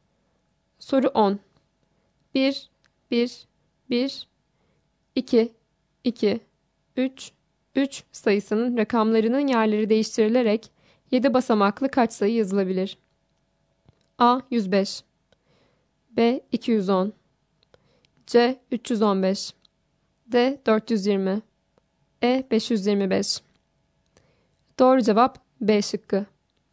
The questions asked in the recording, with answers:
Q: 1, 1, 1, 2, 2, 3, 3 sayısının rakamlarının yerleri değiştirilerek 7 basamaklı kaç sayı yazılabilir?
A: Doğru cevap B şıkkı.